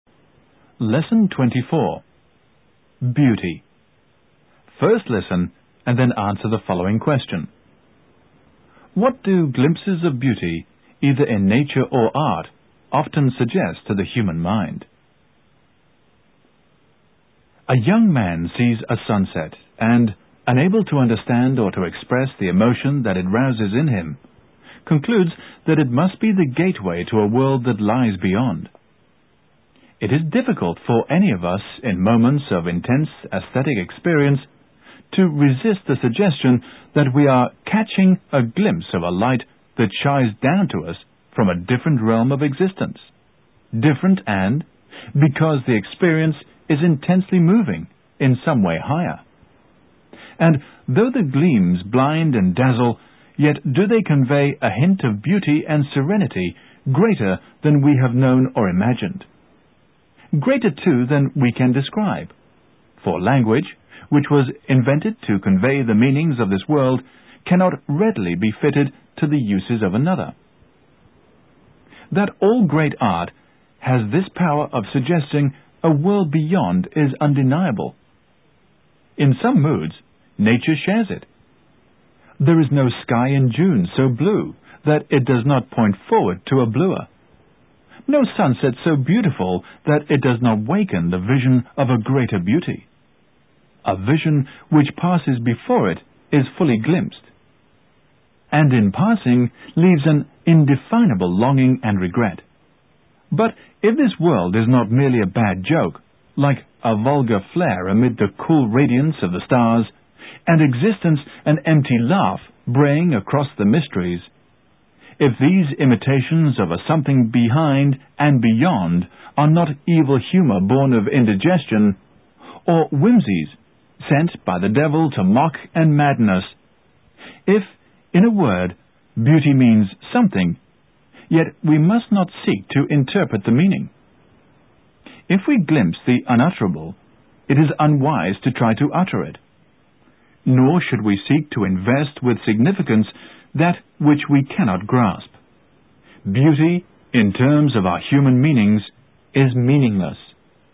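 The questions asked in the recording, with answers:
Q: What do glimpses of beauty, either in nature or art, often suggest to the human mind?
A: That there is a different, higher world or realm of existence beyond this one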